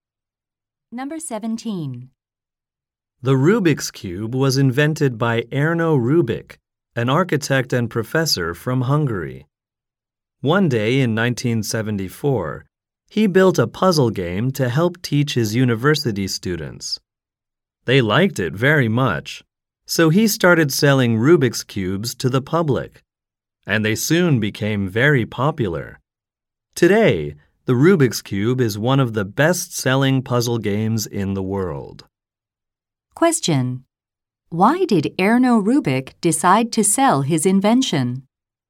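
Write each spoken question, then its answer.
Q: Why did Erno Rubik decide to sell his invention?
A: His university students liked it very much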